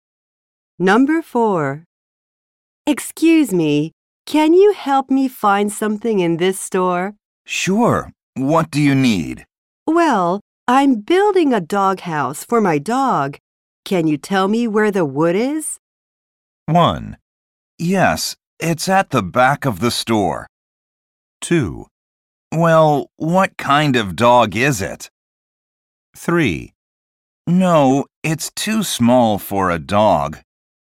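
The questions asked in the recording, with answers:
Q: Can you tell me where the wood is?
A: 1: Yes, it's at the back of the store.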